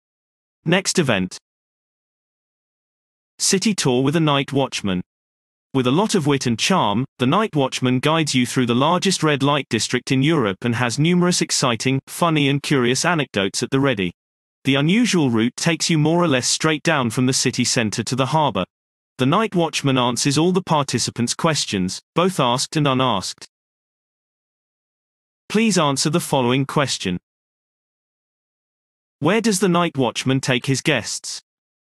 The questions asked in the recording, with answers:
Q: Where does the night watchman take his guests?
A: The night watchman leads his guests from the city center to the harbor directly into the largest red light district in Europe.